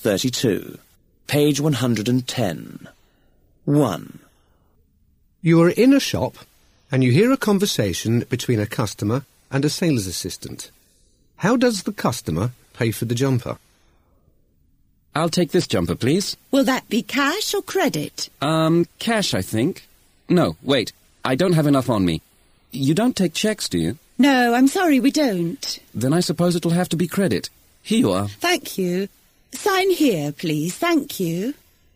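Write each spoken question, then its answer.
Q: How does the customer pay for the jumper?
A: By credit card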